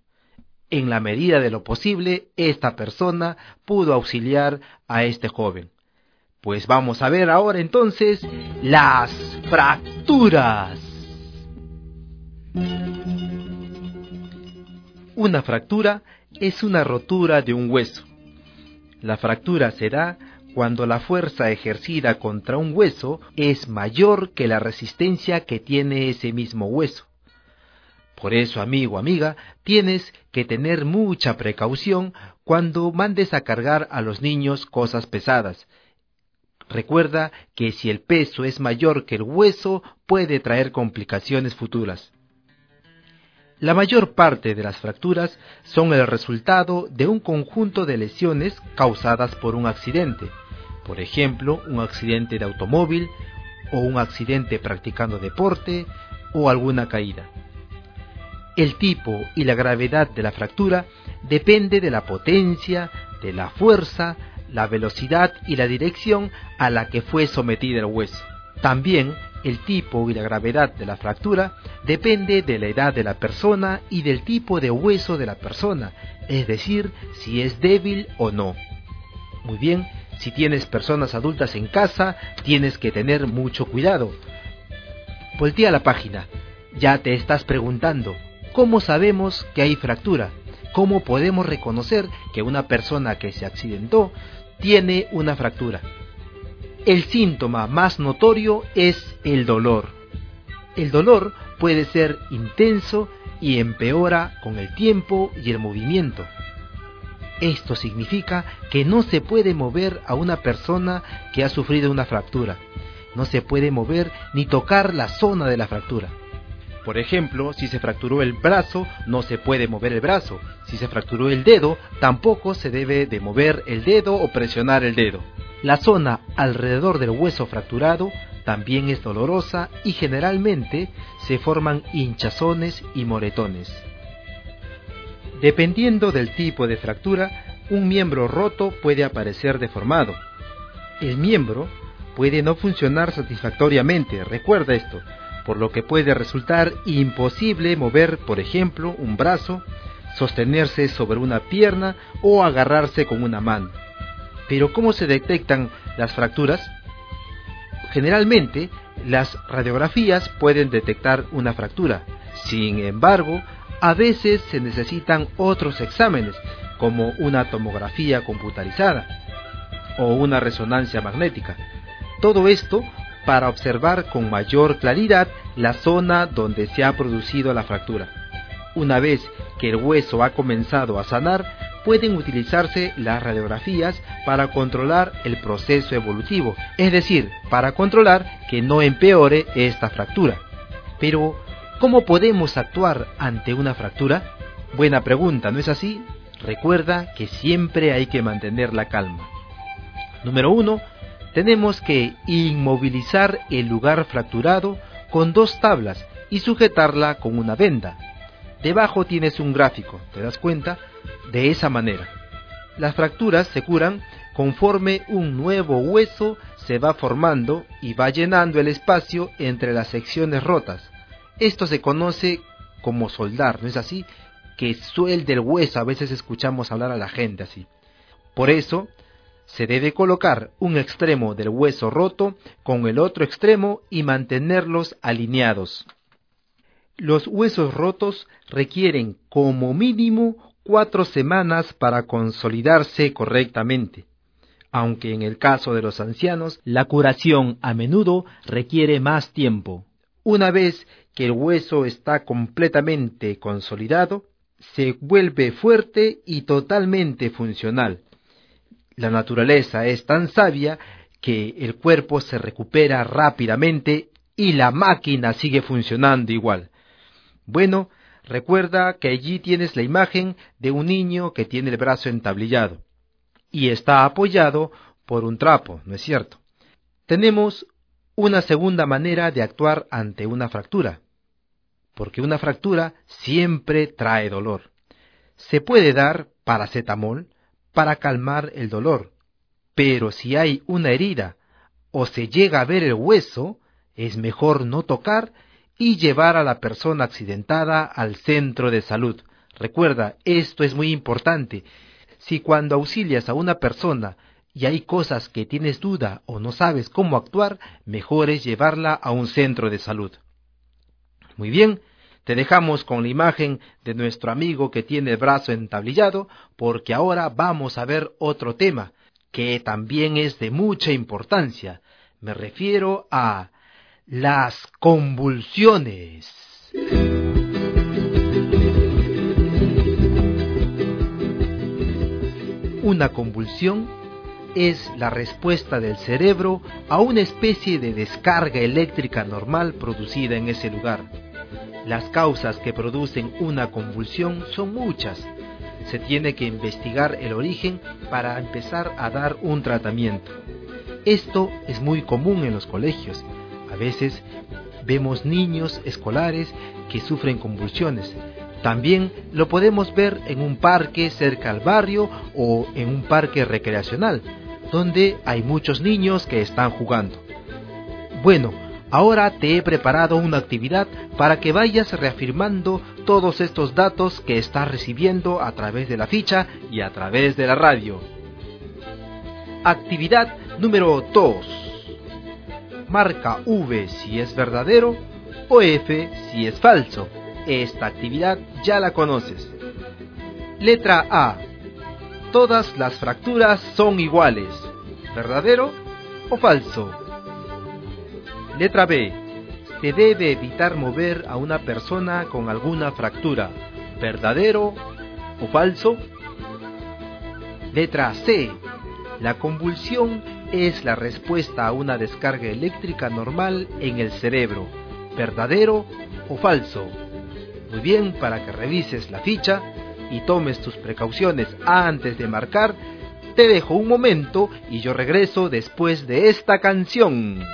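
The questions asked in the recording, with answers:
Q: Todas las fracturas son iguales.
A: Falso

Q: Se debe evitar mover a una persona con alguna fractura.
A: Verdadero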